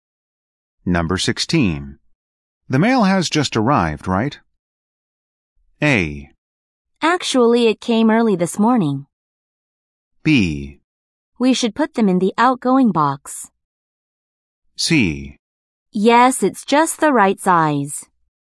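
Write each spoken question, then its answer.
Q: The mail has just arrived, right?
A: A: Actually, it came early this morning.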